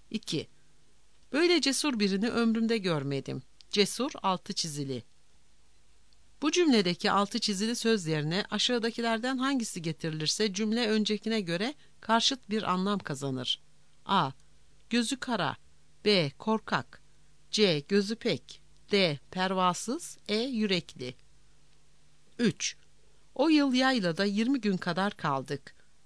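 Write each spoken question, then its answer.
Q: Bu cümledeki altı çizili söz yerine aşağıdakilerden hangisi getirilirse cümle öncekine göre karşıt bir anlam kazanır.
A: B: Korkak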